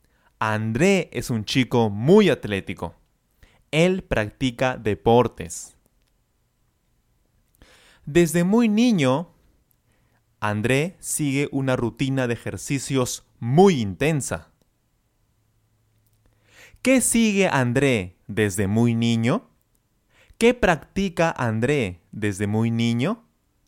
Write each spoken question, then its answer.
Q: ¿Qué sigue André desde muy niño?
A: Claro, él sigue una rutina de ejercicios desde muy niño.